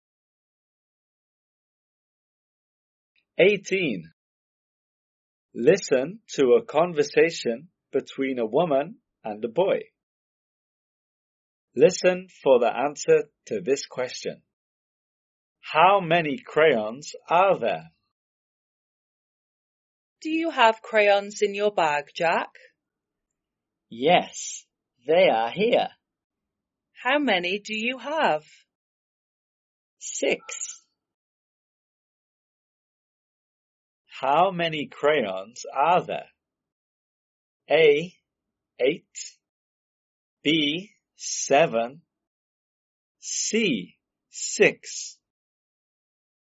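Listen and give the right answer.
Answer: C: 6.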